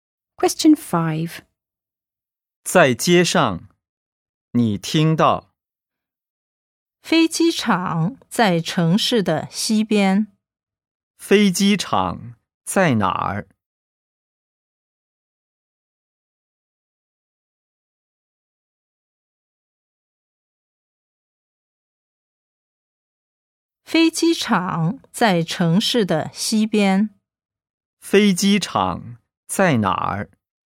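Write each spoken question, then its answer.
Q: 飞机场在哪儿?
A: 城市的西边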